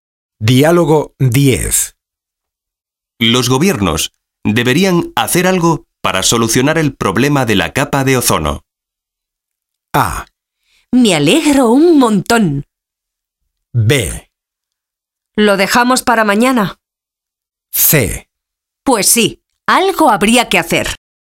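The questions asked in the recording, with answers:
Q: Los gobiernos deberían hacer algo para solucionar el problema de la capa de ozono.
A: C: Pues sí, algo habría que hacer.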